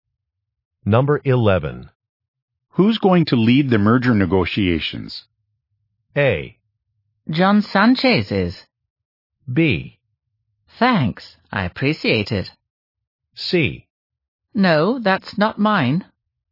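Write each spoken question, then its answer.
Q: Who's going to lead the merger negotiations?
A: A: John Sanchez is.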